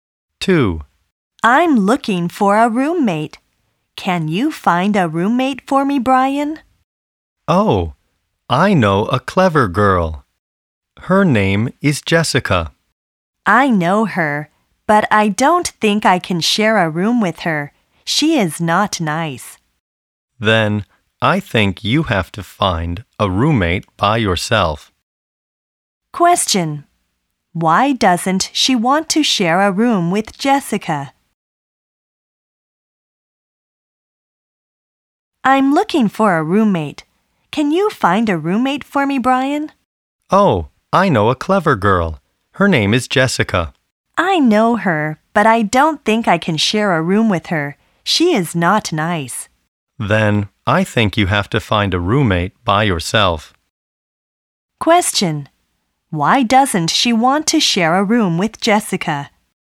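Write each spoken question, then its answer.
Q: Why doesn't she want to share a room with Jessica?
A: Because Jessica is not nice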